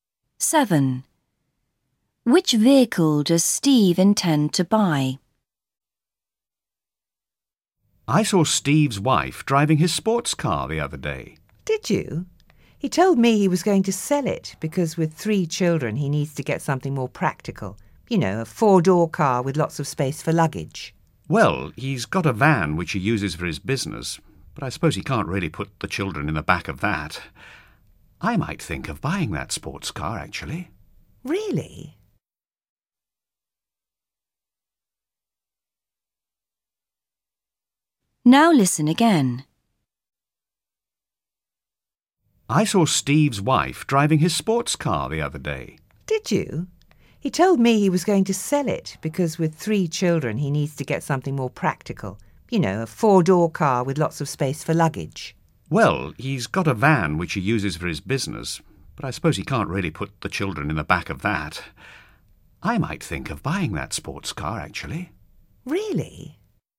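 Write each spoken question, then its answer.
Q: Which vehicle does Steve intend to buy?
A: A 4-door car with lots of luggage space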